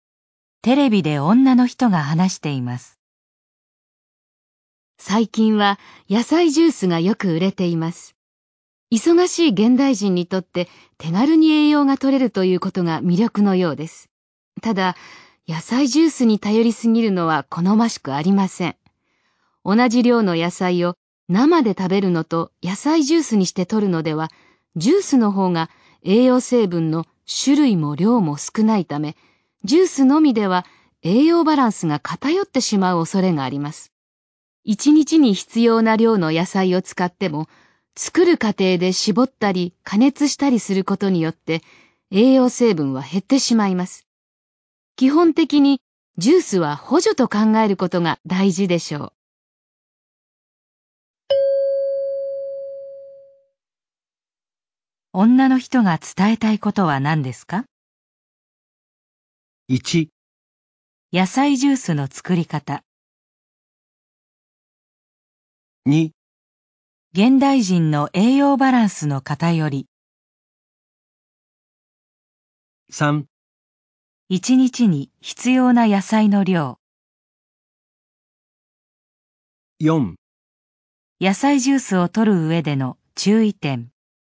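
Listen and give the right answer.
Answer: 4: 野菜ジュースを取る上での注意点。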